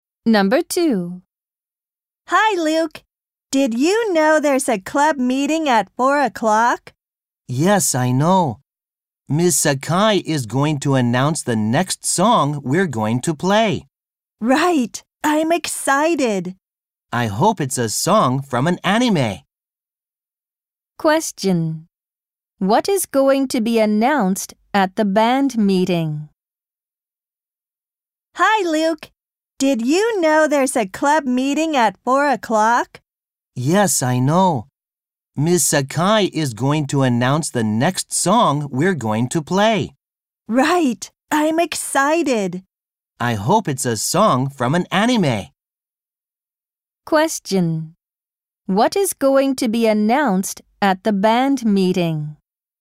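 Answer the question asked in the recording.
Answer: The next song they are going to play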